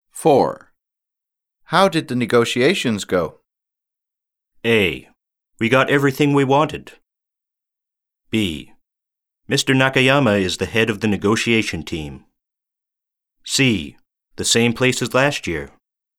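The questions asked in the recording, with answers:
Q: How did the negotiations go?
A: A: We got everything we wanted.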